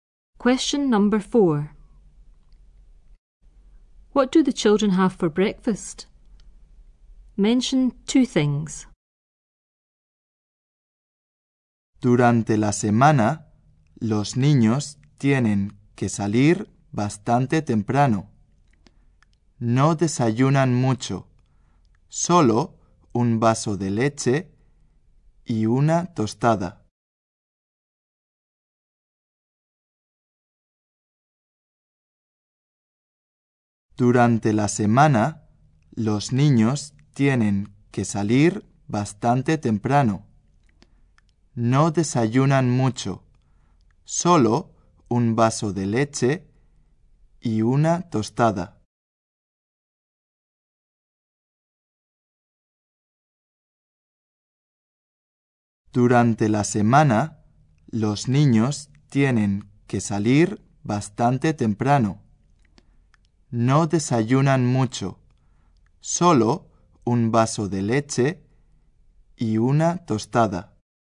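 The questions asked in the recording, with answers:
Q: What do the children have for breakfast?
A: A glass of milk and a piece of toast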